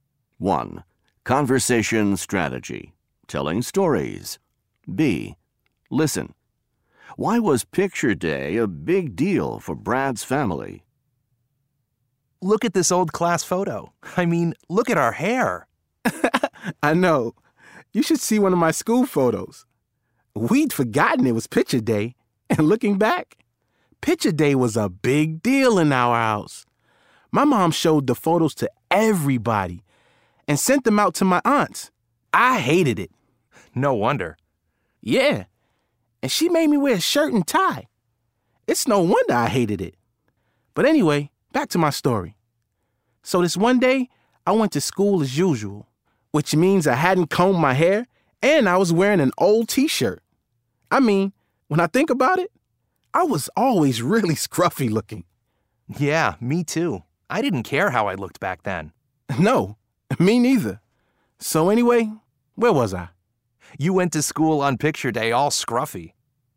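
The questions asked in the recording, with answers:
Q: Why was picture day a big deal for Brad's family?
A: His mom showed the photos to everybody and sent them to his aunts.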